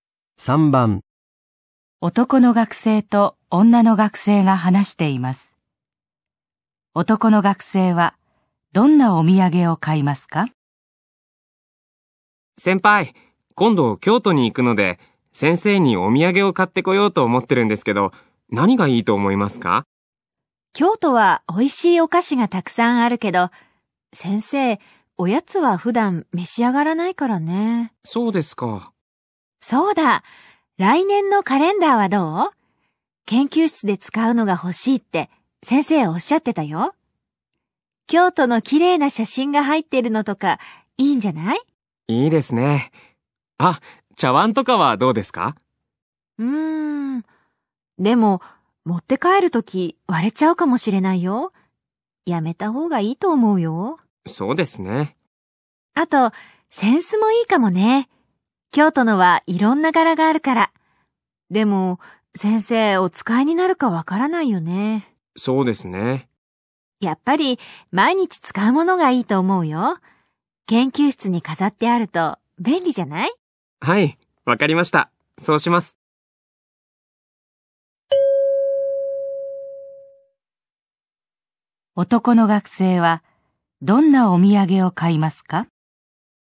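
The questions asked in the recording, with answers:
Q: 男の学生はどんなお土産を買いますか?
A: 京都の写真が入ったカレンダー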